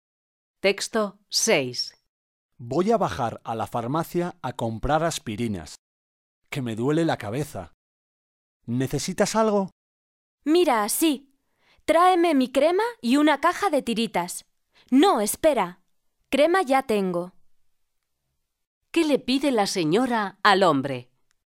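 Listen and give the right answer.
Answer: Una caja de tiritas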